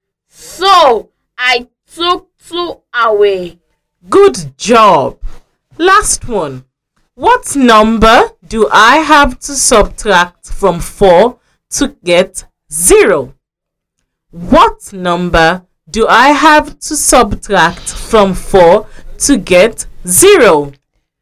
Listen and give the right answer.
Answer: I have to subtract 4 to get 0.